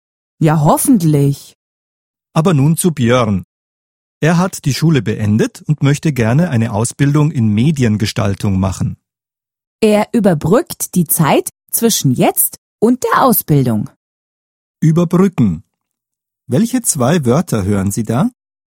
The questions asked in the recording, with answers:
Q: Überbrücken. Welche zwei Wörter hören Sie da?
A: Über und die Brücke.